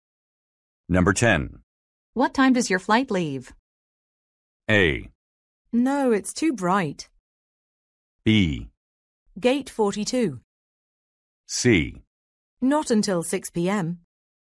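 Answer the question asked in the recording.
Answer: C: Not until 6 p.m.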